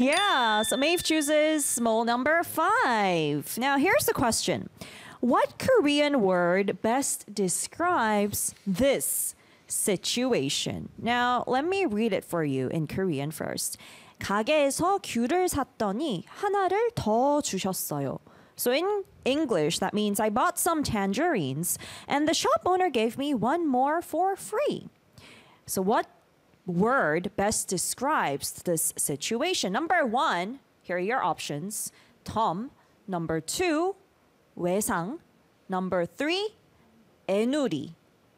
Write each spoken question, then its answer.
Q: So what word best describes this situation?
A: So the answer is Tom.